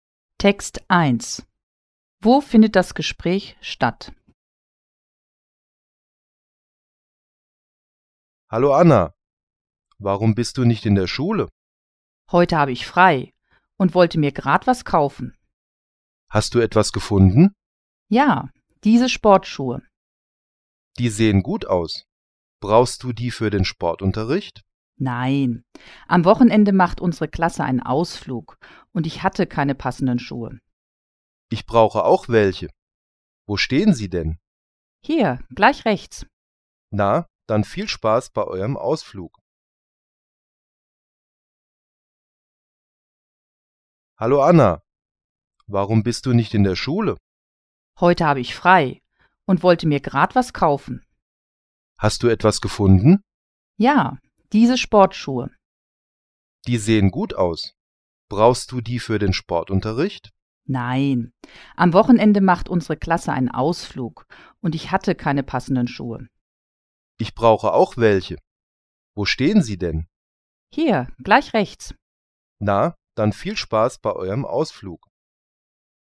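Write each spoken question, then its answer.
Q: Wo findet das Gespräch statt?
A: In einem Schuhgeschäft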